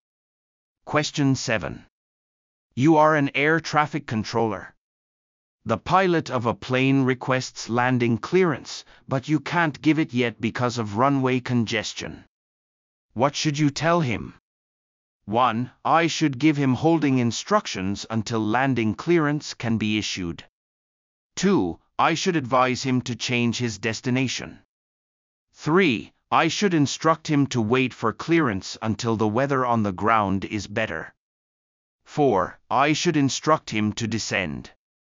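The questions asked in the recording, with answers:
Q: What should you tell him?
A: 1: I should give him holding instructions until landing clearance can be issued.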